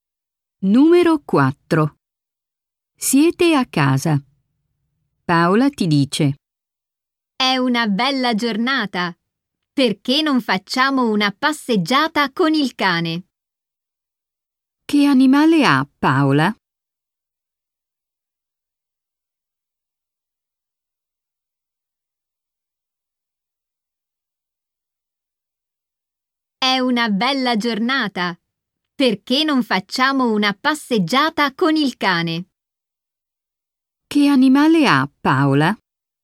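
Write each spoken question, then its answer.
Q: Che animale ha Paola?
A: Un cane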